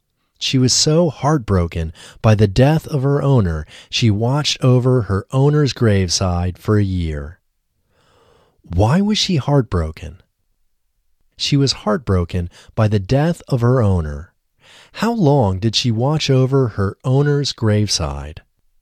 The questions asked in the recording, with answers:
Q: How long did she watch over her owner's graveside?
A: She watched over her owner's graveside for a year.